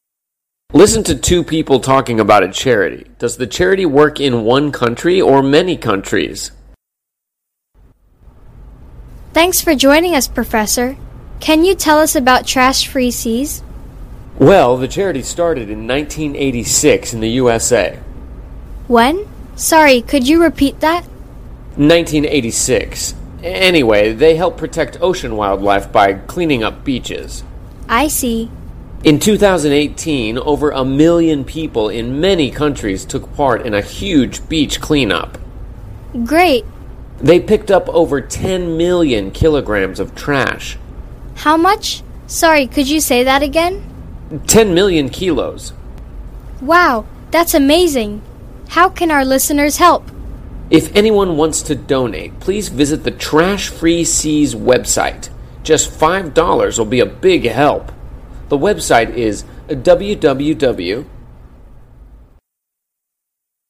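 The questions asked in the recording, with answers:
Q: Does the charity work in one country or many countries?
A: Many countries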